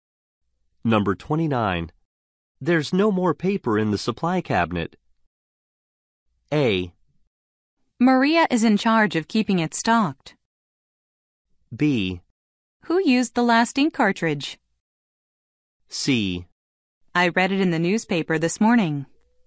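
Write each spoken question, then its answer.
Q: There's no more paper in the supply cabinet.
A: A: Maria is in charge of keeping it stocked.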